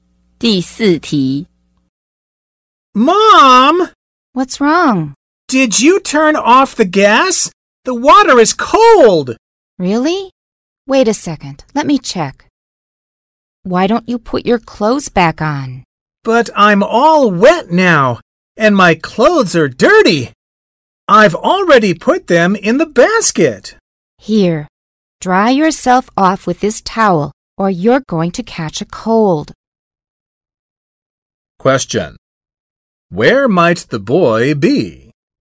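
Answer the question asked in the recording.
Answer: In the bathroom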